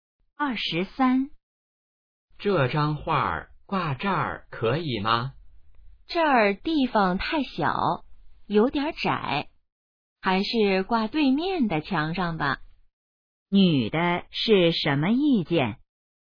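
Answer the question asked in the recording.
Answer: 挂对面的墙上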